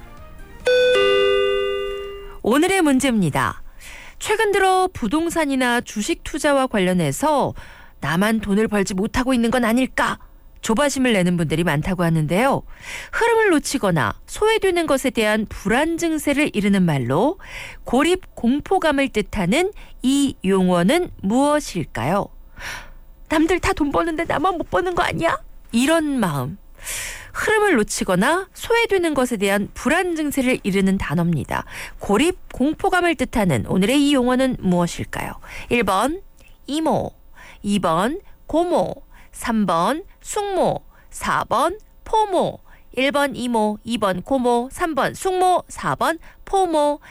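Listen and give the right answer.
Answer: 4: 포모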